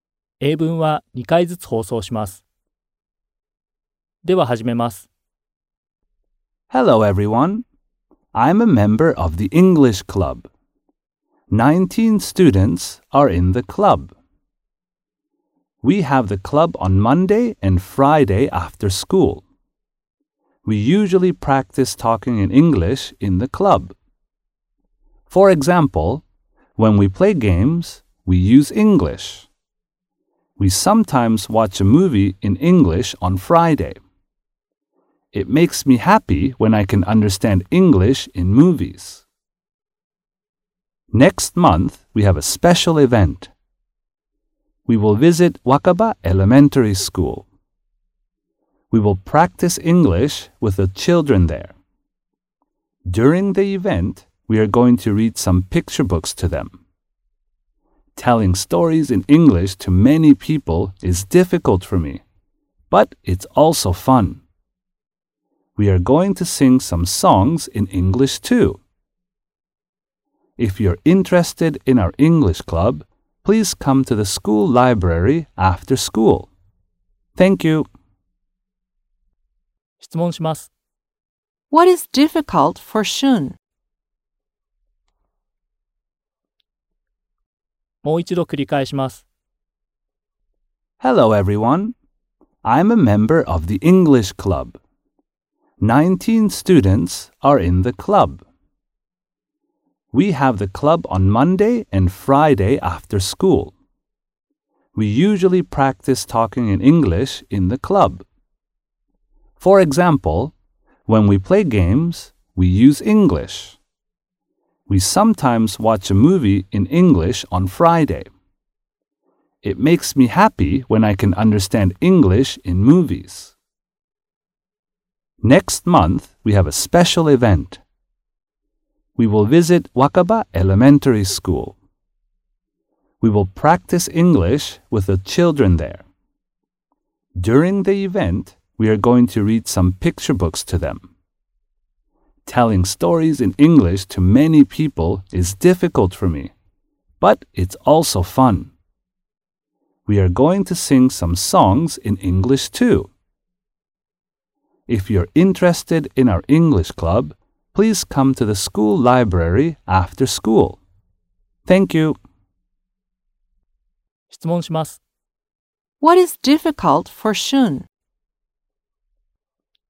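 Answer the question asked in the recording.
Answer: Telling stories in English to many people.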